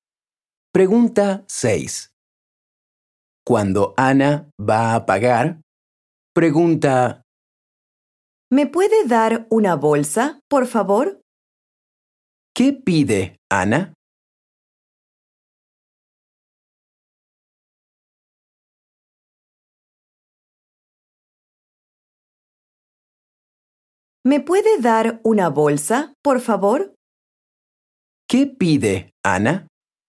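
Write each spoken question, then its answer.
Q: ¿Qué pide Ana?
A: Una bolsa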